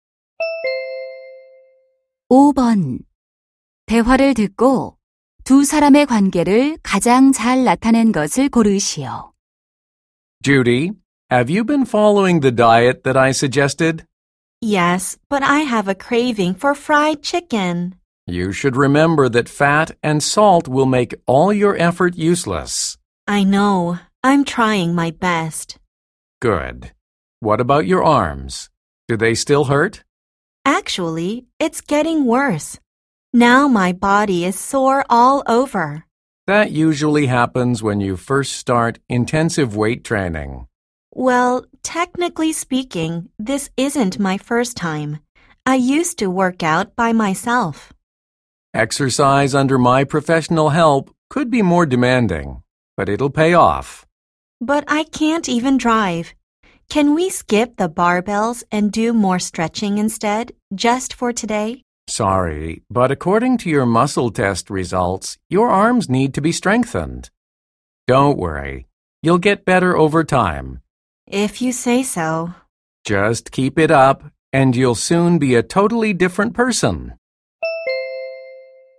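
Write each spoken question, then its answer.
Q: 대화를 듣고 두 사람의 관계를 가장 잘 나타낸 것을 고르시오.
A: 개인 트레이너 - 회원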